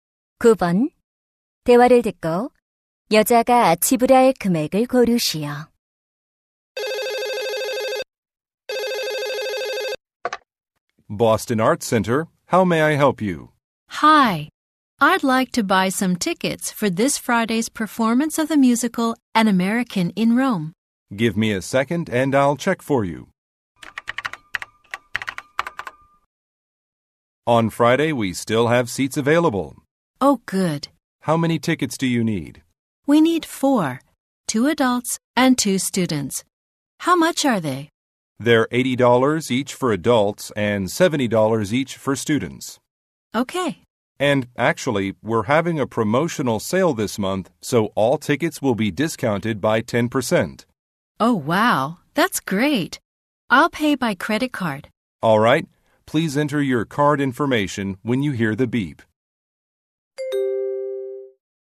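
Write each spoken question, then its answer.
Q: 대화를 듣고 여자가 지불할 금액을 고르시오.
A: $270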